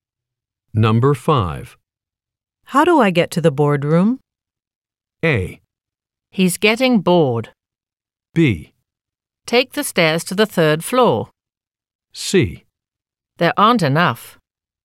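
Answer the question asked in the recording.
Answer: B: Take the stairs to the third floor.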